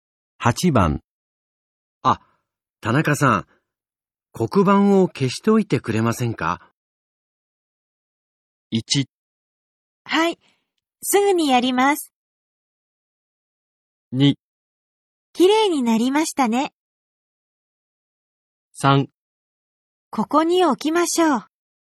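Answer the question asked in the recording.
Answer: 1: はい、すぐにやります。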